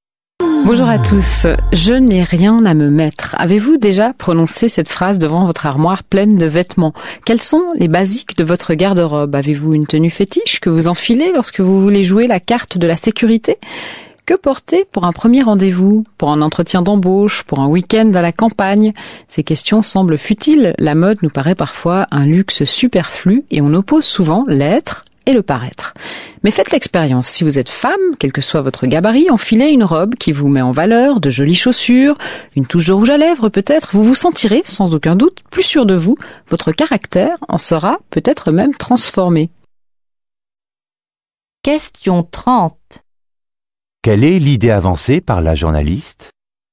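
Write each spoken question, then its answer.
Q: Quelle est l'idée avancée par la journaliste ?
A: Les vêtements influent sur la confiance en soi et le caractère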